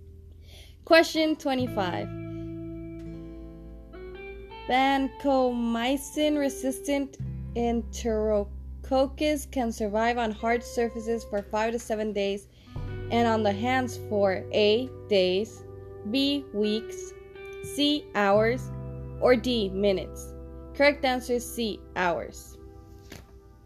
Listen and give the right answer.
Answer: Correct answer is C, hours.